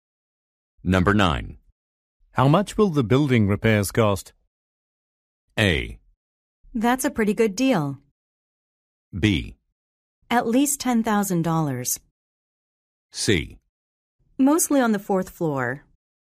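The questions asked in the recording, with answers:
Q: How much will the building repairs cost?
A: B: At least $10,000.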